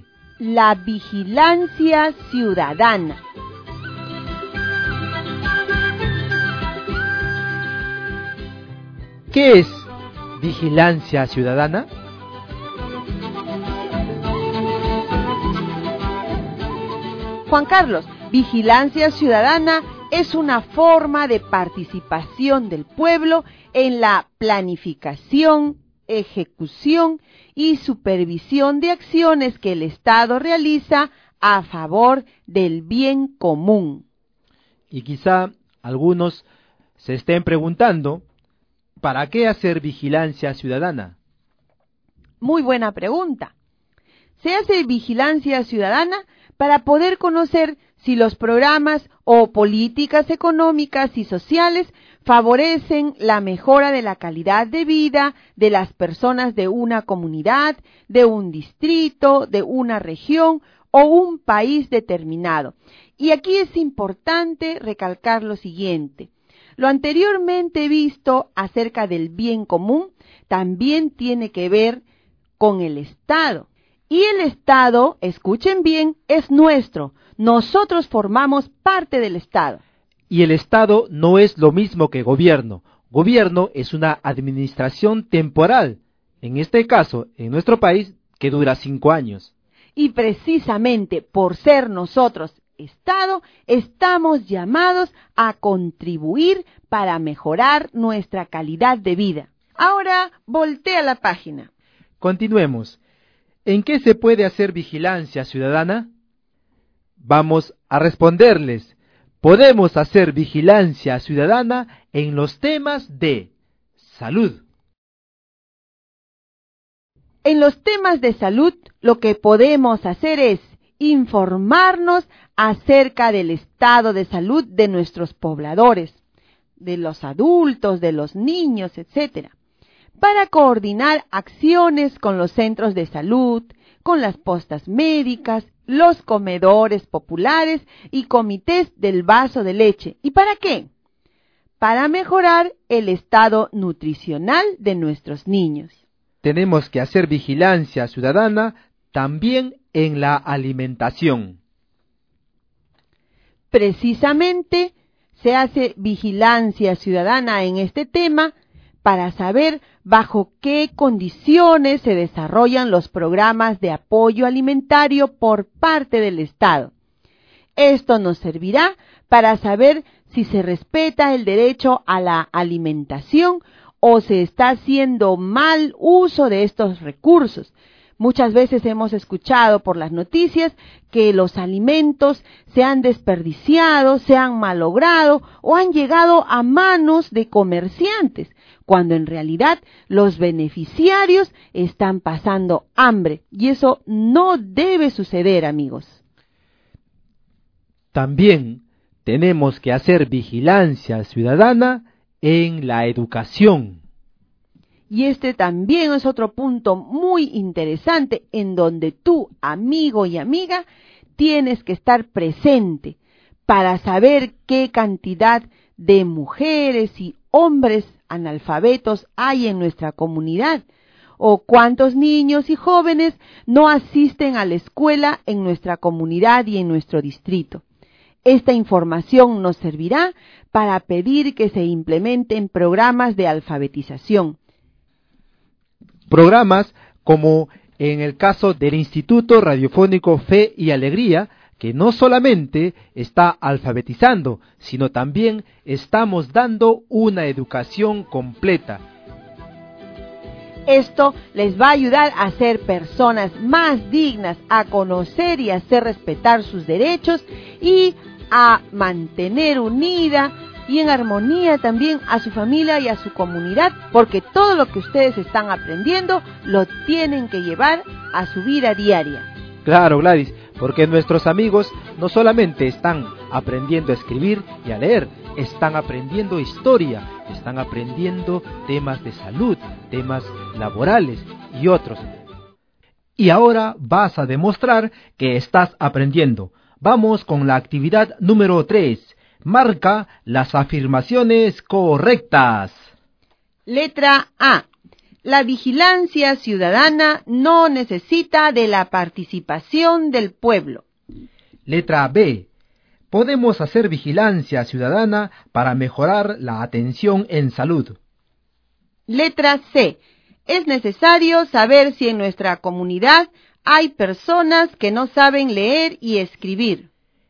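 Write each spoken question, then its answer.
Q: Letra A. La vigilancia ciudadana no necesita de la participación del pueblo.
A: Incorrecta

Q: Letra B. Podemos hacer vigilancia ciudadana para mejorar la atención en salud.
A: Correcta

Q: Letra C. Es necesario saber si en nuestra comunidad hay personas que no saben leer y escribir.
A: Correcta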